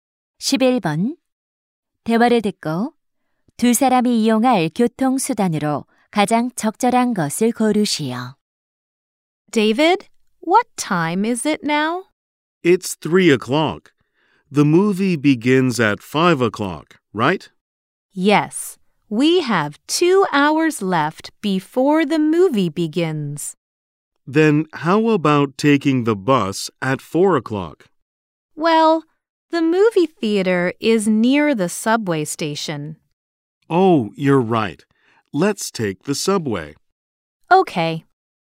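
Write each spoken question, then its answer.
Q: 대화를 듣고 두 사람이 이용할 교통수단으로 가장 적절한 것을 고르시오.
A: 지하철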